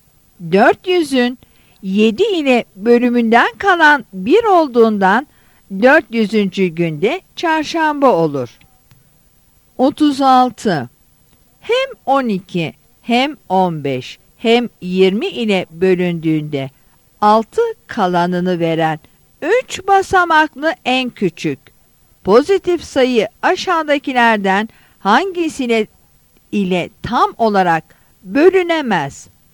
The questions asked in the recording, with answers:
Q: Hem 12 hem 15 hem 20 ile bölündüğünde 6 kalanını veren 3 basamaklı en küçük pozitif sayı aşağıdakilerden hangisine ile tam olarak bölünemez?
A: Yanıt C'dir.